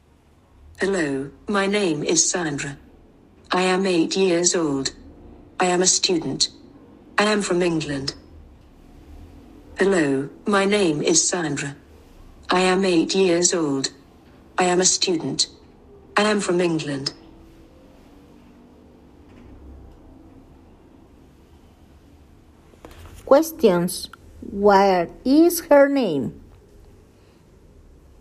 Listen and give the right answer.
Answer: Her name is Sandra.